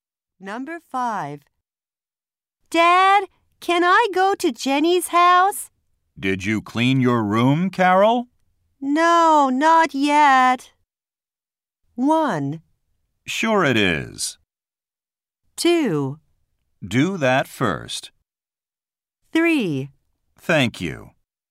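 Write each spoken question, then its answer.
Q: No, not yet.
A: 2: Do that first.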